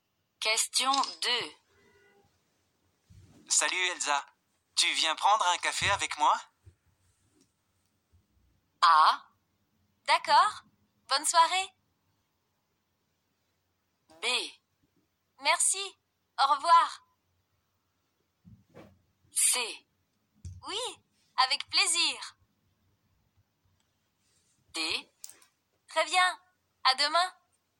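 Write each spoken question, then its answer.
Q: Salut Elsa, tu viens prendre un café avec moi?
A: C: Oui, avec plaisir.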